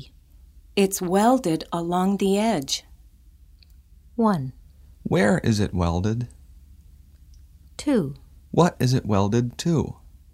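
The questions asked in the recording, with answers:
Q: Where is it welded?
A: Along the edge.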